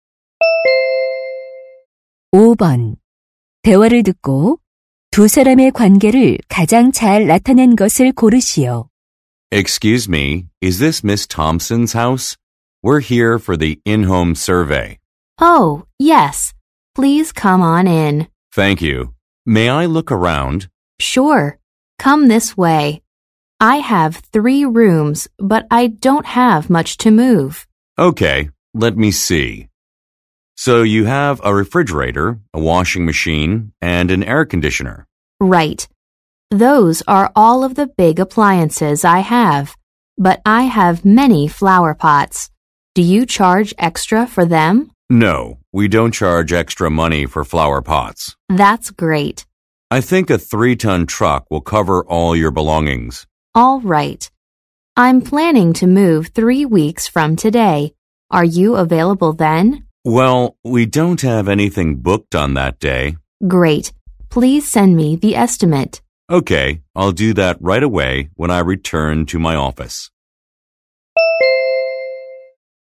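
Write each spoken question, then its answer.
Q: 대화를 듣고 두 사람의 관계를 가장 잘 나타낸 것을 고르시오.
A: 이사 의뢰인 - 이삿짐 센터 직원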